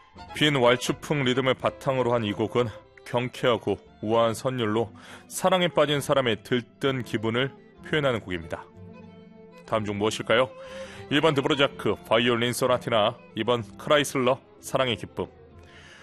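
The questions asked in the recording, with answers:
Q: 다음 중 무엇일까요? 1번 드브로자크, 바이올린 소나티나, 2번 크라이슬러, 사랑의 기쁨.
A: 2: 크라이슬러, 사랑의 기쁨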